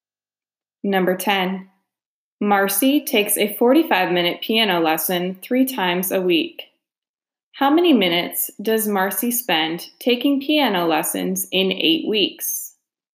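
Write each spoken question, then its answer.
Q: How many minutes does Marcy spend taking piano lessons in 8 weeks?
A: 1,080 minutes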